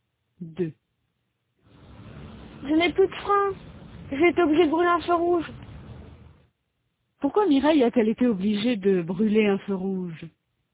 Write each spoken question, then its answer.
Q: Pourquoi Mireille a-t-elle été obligée de brûler un feu rouge?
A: Parce qu'elle n'avait plus de frein.